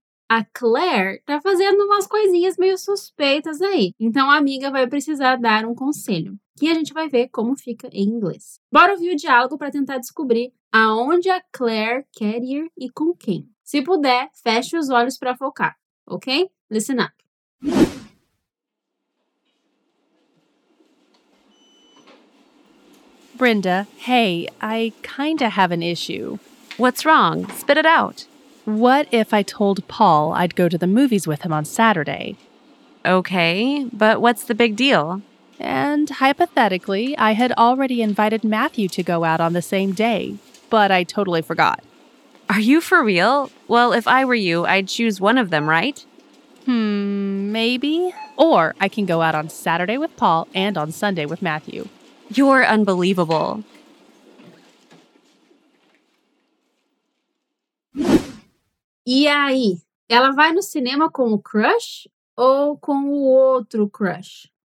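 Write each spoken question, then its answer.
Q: E aí, ela vai no cinema com o crush ou com o outro crush?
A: Com o Paul no sábado (e quer sair com o Matthew no domingo)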